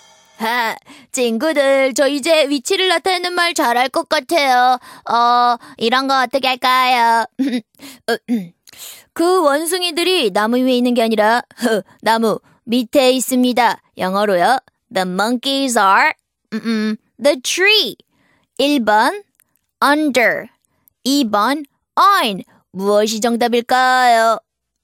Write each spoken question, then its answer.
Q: 그 원숭이들이 나무 위에 있는 게 아니라 나무 밑에 있습니다. 영어로요. The monkeys are the tree. 1번 under, 2번 on. 무엇이 정답일까요?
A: 정답 1번입니다.